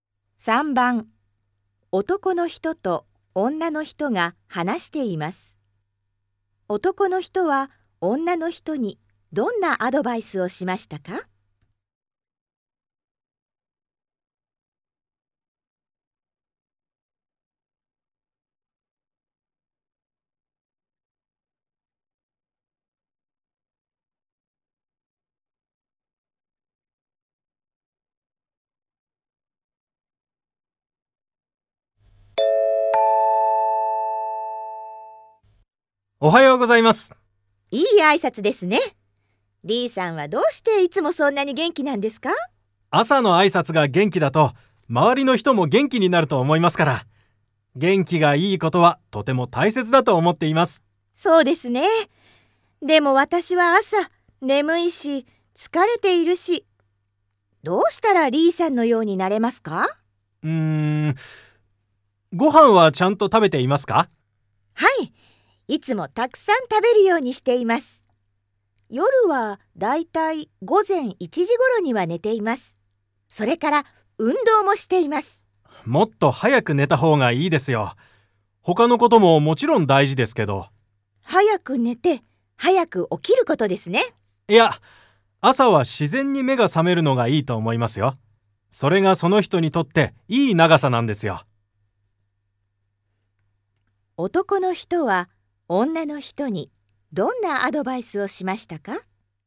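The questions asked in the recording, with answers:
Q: 男の人は女の人にどんなアドバイスをしましたか?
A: もっと早く寝た方がいい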